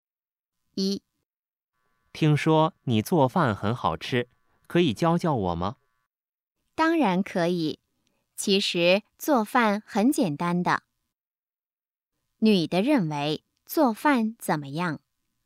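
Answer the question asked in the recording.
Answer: 很简单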